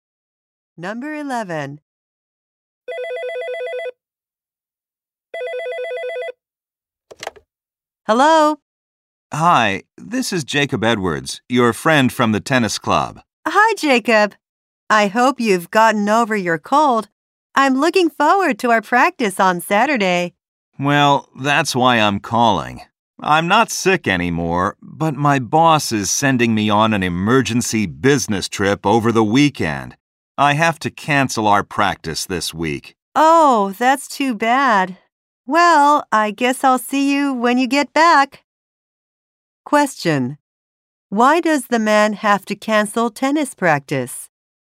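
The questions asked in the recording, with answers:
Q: Why does the man have to cancel tennis practice?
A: He has to go on an emergency business trip.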